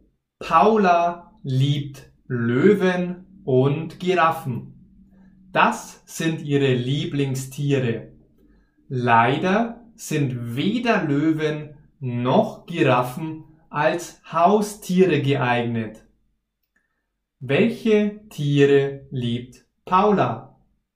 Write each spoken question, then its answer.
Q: Welche Tiere liebt Paula?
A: Löwen und Giraffen. Sie liebt diese Tiere.